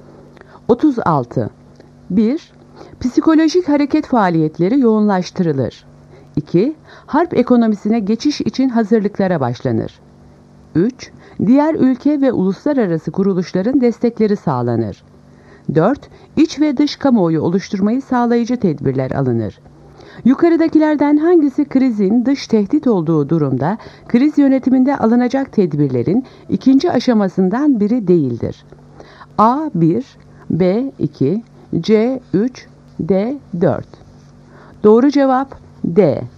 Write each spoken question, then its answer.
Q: Yukarıdakilerden hangisi krizin dış tehdit olduğu durumda kriz yönetiminde alınacak tedbirlerin ikinci aşamasından biri değildir?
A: Doğru cevap D. 4.